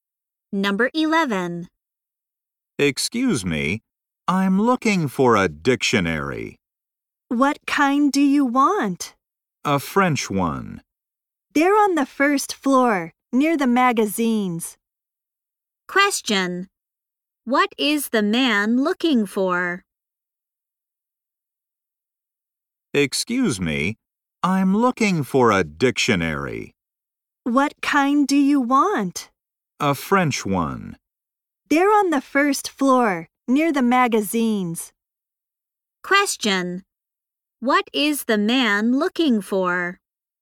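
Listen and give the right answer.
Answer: A French dictionary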